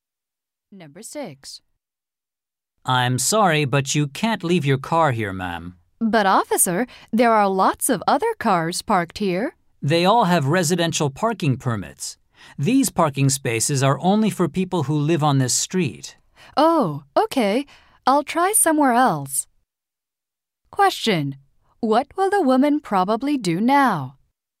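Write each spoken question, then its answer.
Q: What will the woman probably do now?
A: Park her car somewhere else.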